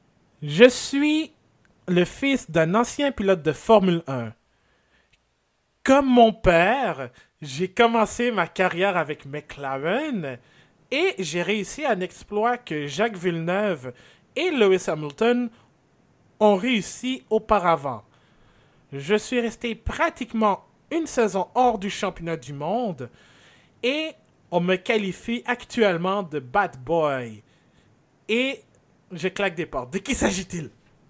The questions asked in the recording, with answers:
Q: De qui s'agit-il?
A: C'est Kevin Magnussen, effectivement, pilote de Haas